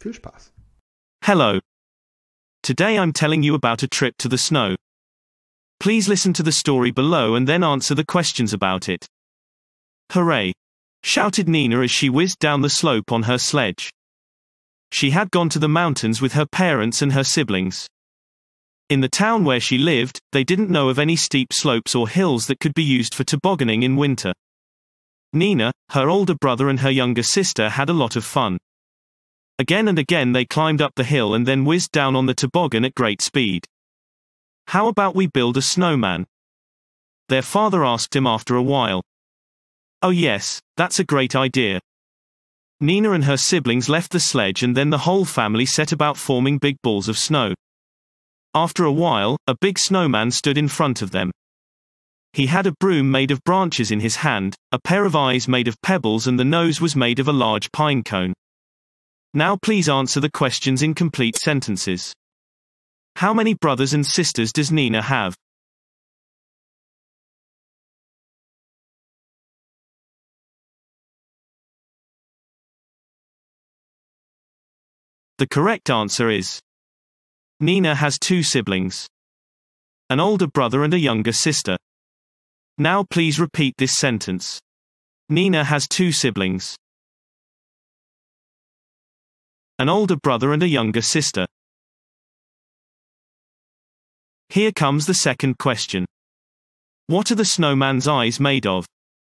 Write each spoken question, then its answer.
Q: How many brothers and sisters does Nina have?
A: The correct answer is Nina has two siblings, an older brother and a younger sister.

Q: What are the snowman's eyes made of?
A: The correct answer is the snowman's eyes are made of pebbles.